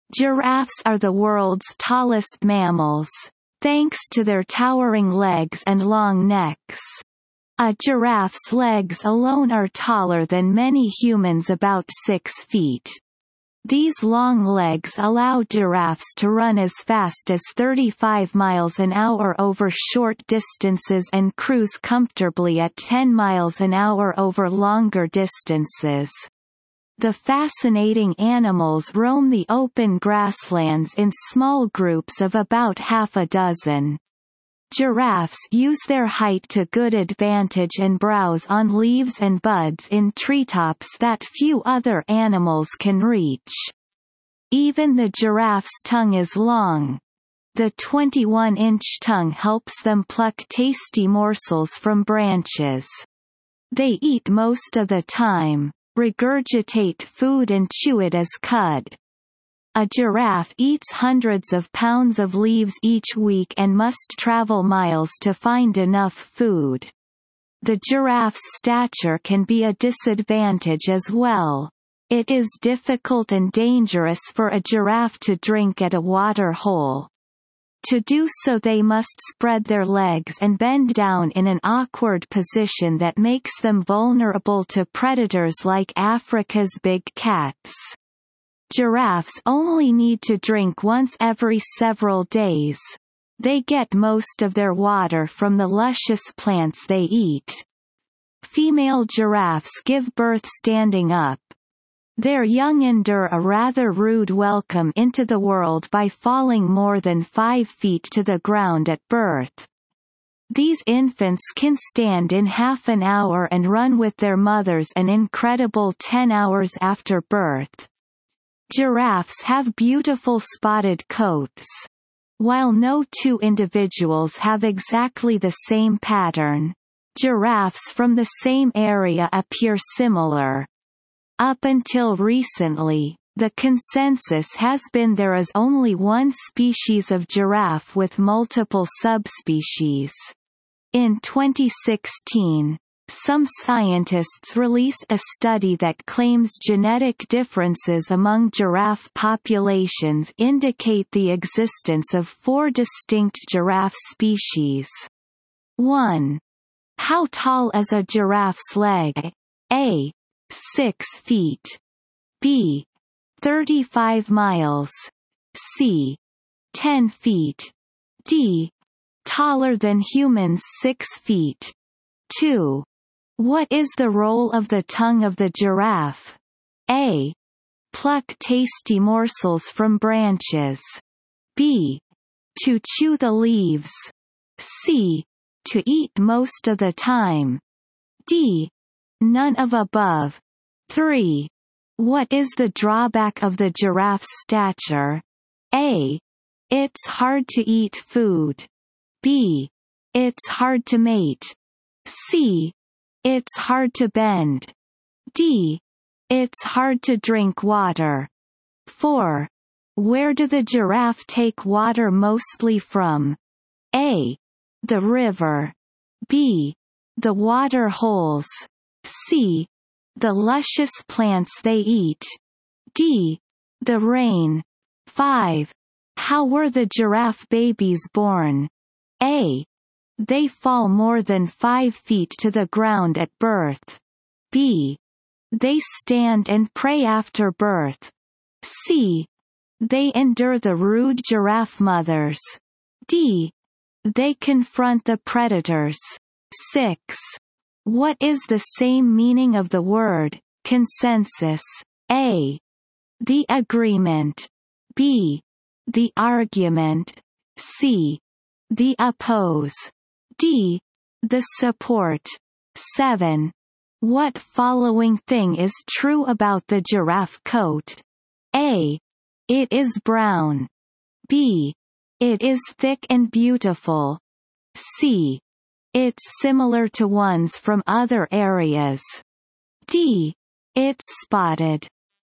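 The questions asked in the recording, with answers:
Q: What is the role of the tongue of the giraffe?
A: A: Pluck tasty morsels from branches.

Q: What is the drawback of the giraffe's stature?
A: D: It's hard to drink water.

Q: Where do the giraffe take water mostly from?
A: C: The luscious plants they eat.

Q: How were the giraffe babies born?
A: A: They fall more than 5 feet to the ground at birth.

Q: What is the same meaning of the word, consensus?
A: A: The agreement.

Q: What following thing is true about the giraffe coat?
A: D: It's spotted.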